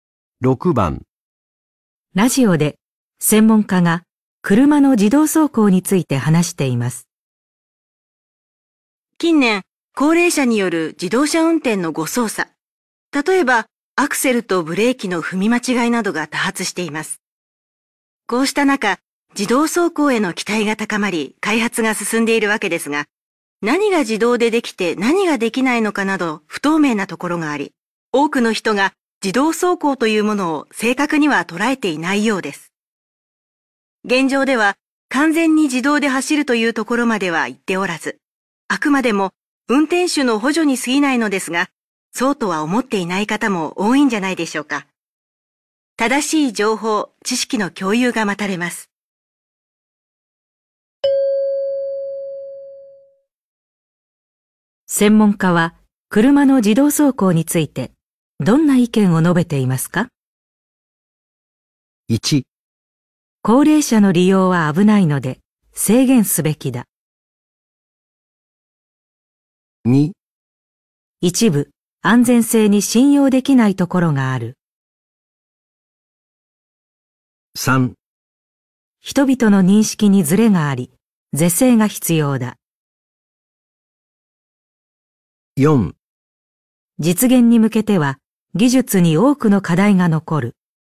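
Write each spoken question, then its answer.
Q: 専門家は車の自動走行についてどんな意見を述べていますか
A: 3: 人々の認識にズレがあり、是正が必要だ。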